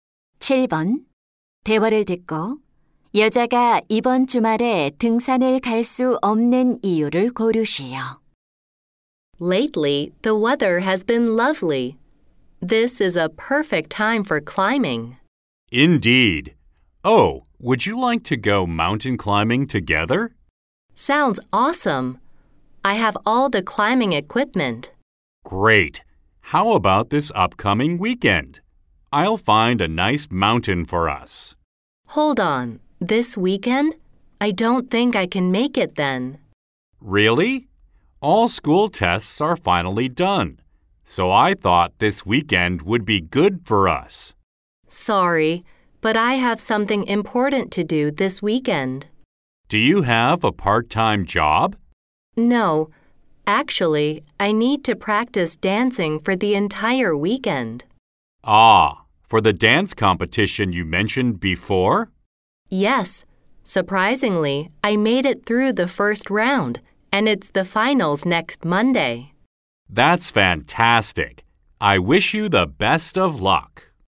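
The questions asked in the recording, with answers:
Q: 대화를 듣고 여자가 이번 주말에 등산을 갈 수 없는 이유를 고르시오.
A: 댄스 대회 결승을 위해 춤 연습을 해야 해서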